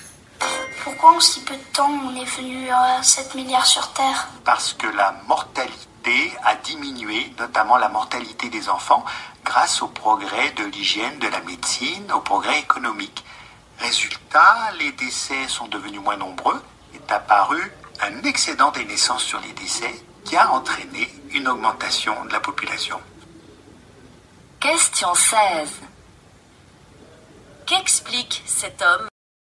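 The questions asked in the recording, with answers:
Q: Qu'explique cet homme ?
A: Pourquoi la population mondiale a augmenté si vite (baisse de la mortalité)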